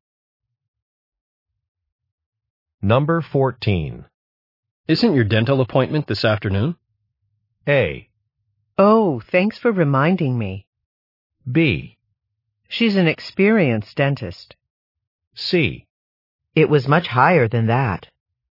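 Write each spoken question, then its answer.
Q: Isn't your dental appointment this afternoon?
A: A: Oh, thanks for reminding me.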